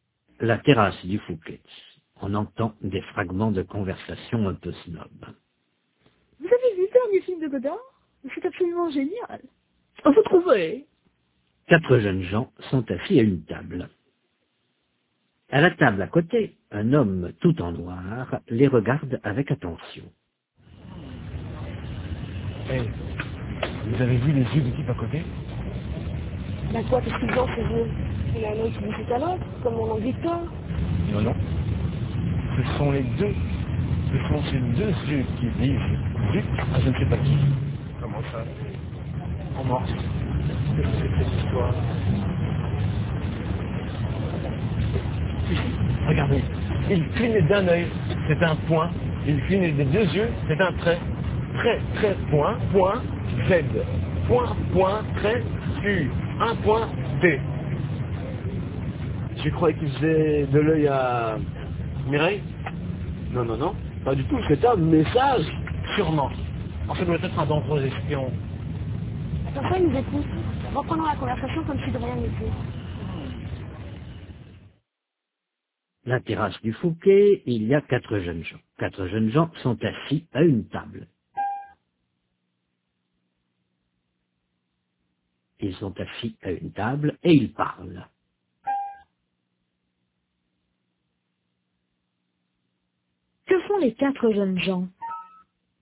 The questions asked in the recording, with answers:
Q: Que font les quatre jeunes gens?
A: Ils parlent.